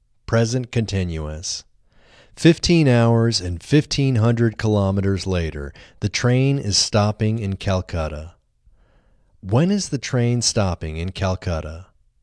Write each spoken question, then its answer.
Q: When is the train stopping in Calcutta?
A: 15 hours and 1,500 kilometers later, the train is stopping in Calcutta.